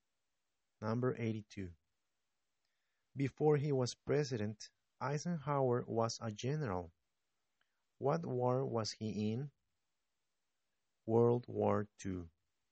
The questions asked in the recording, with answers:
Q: What war was he in?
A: World War II.